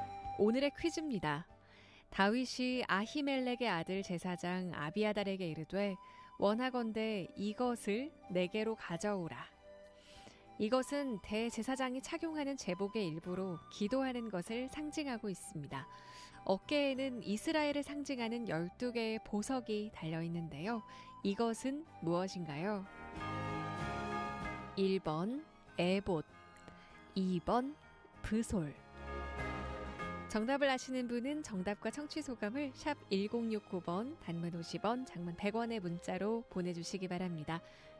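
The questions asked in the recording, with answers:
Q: 이것은 무엇인가요? 1번 에봇, 2번 브솔.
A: 1: 에봇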